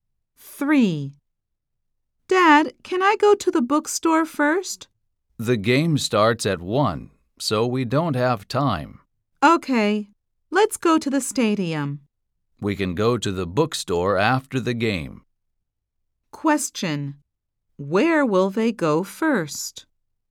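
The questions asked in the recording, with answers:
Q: Where will they go first?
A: To the stadium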